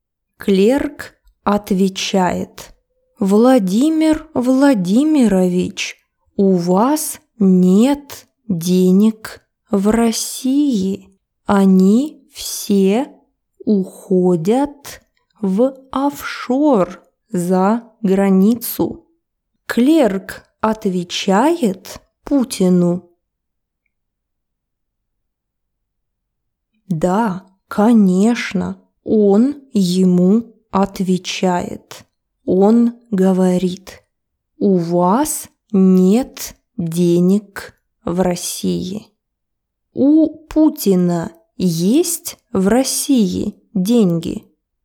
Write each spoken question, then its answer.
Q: У Путина есть в России деньги?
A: Нет, у Путина денег в России нет.